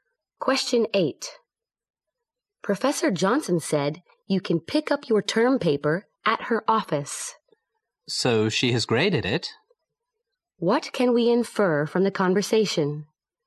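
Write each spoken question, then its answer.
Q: What can we infer from the conversation?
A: Professor Johnson has graded the term paper.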